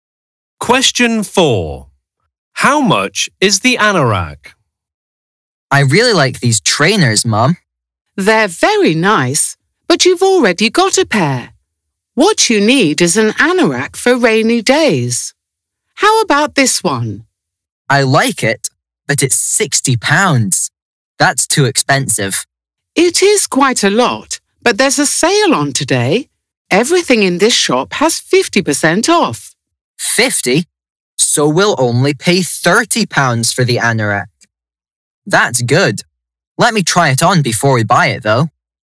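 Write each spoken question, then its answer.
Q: How much is the anorak?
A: £30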